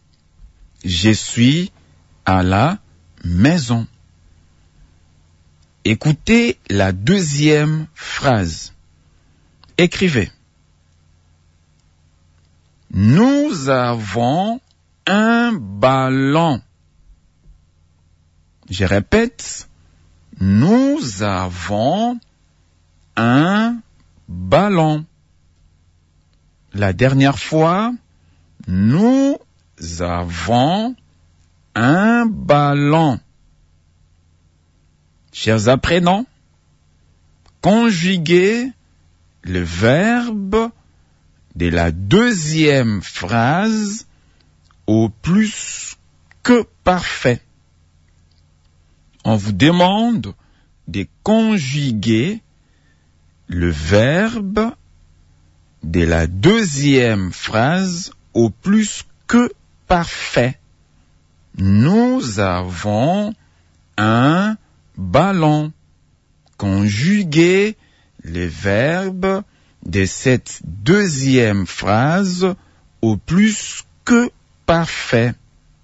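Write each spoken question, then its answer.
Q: Nous avons un ballon. Conjuguez le verbe de cette deuxième phrase au plus que parfait.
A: Nous avions eu un ballon.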